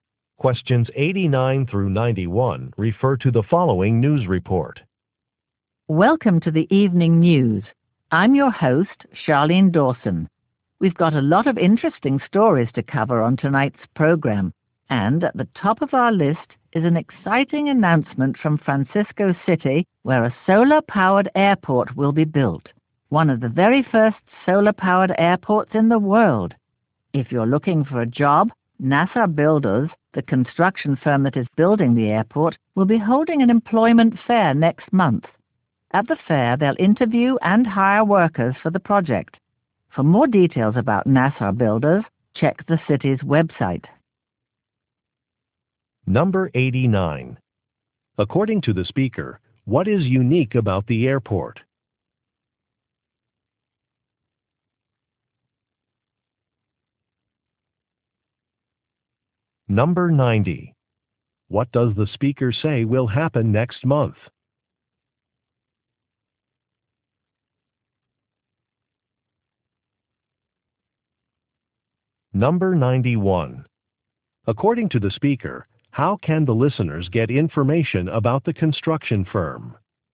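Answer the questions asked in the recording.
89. It will be solar-powered
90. An employment fair will be held
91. By checking the city's website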